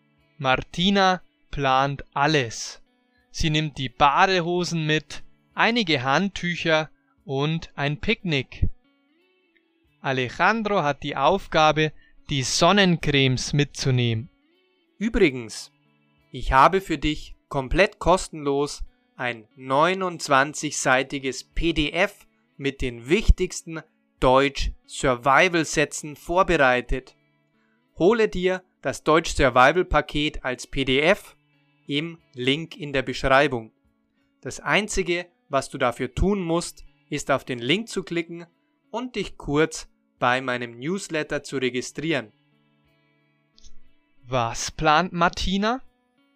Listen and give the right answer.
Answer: Sie plant alles. Sie nimmt die Badehosen mit, einige Handtücher und ein Picknick.